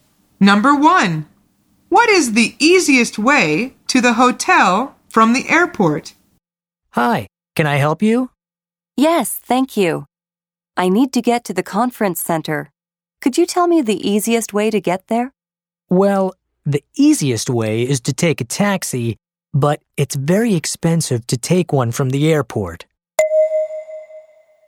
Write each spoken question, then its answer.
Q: what is the easiest way to the hotel from the airport?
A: The answer is by taxi.